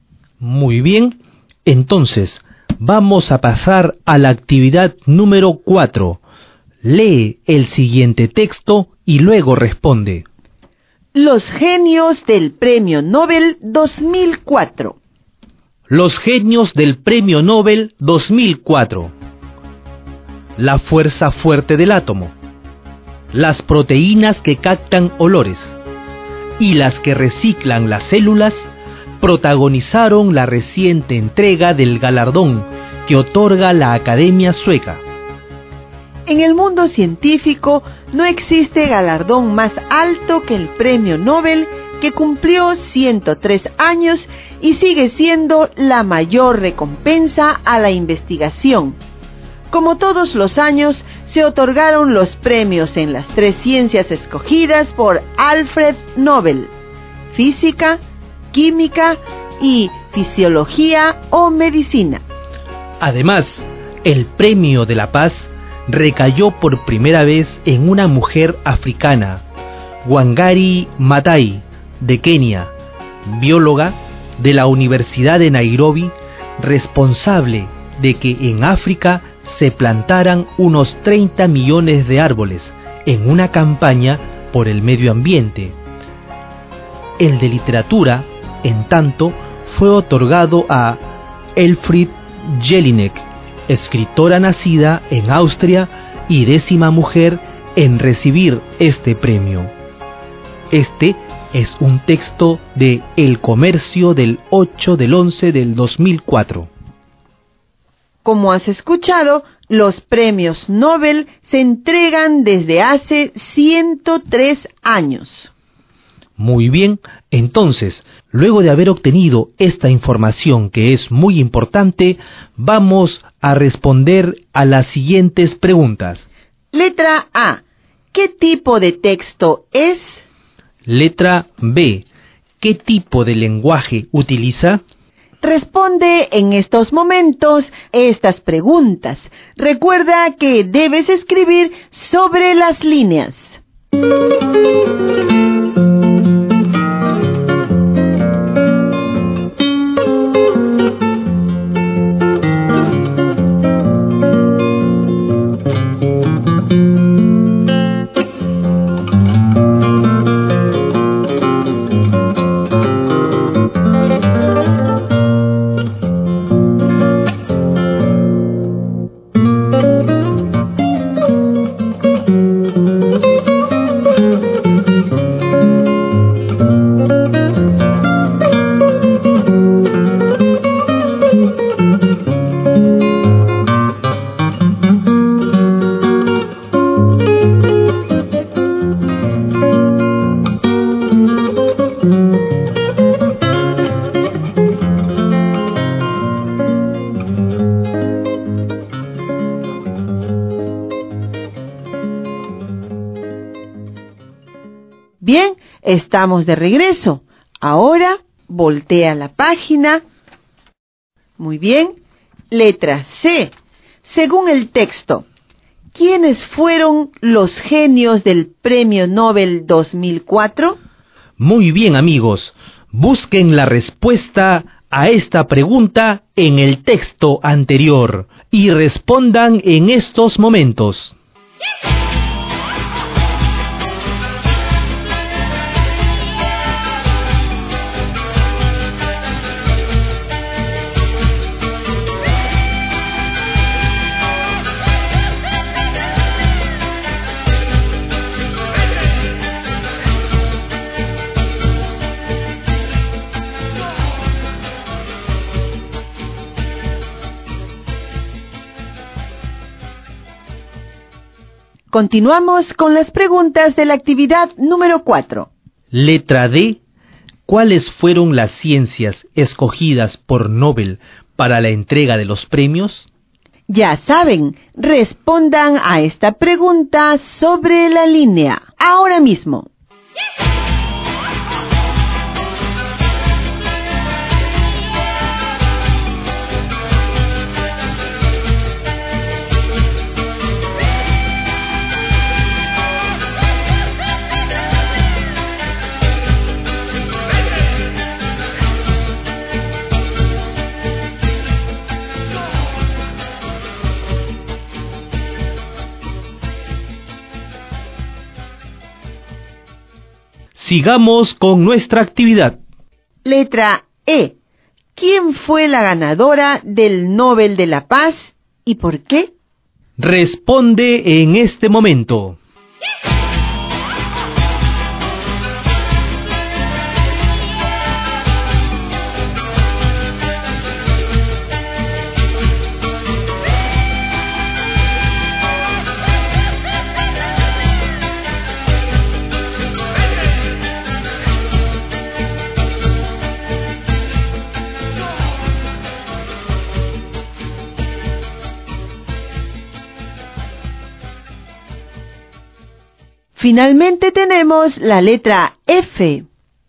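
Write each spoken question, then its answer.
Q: ¿Cuáles fueron las ciencias escogidas por Nobel para la entrega de los premios?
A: Física, química y fisiología o medicina

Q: ¿Quién fue la ganadora del Nobel de la Paz y por qué?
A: Wangari Maathai, de Kenia, por una campaña ambiental en la que se plantaron unos 30 millones de árboles en África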